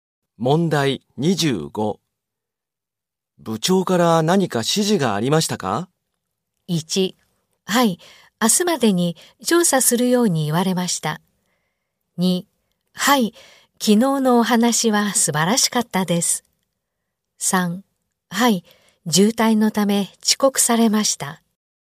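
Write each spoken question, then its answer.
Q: 部長から何か指示がありましたか?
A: 2: はい、明日までに調査するように言われました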